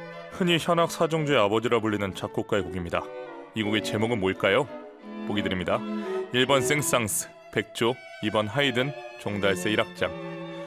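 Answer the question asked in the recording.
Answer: 2번: 하이든, 종달새 1악장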